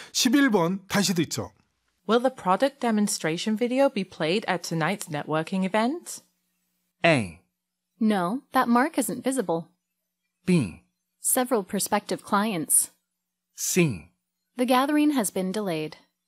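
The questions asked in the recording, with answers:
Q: Will the product demonstration video be played at tonight's networking event?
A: C: The gathering has been delayed.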